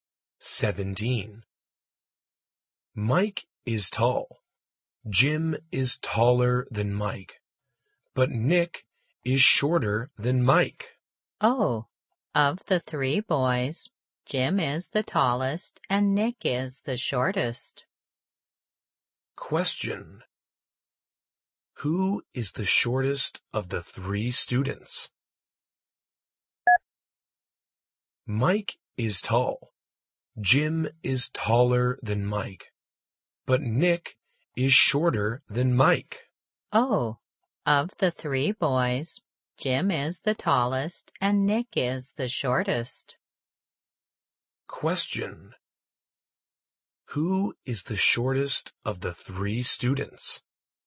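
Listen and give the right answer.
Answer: Nick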